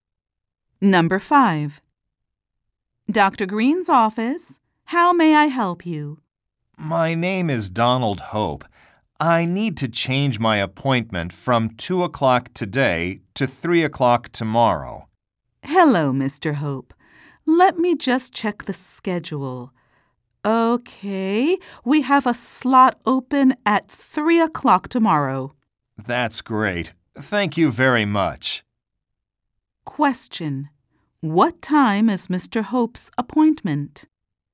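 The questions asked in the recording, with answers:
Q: What time is Mr. Hope's appointment?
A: 3:00 tomorrow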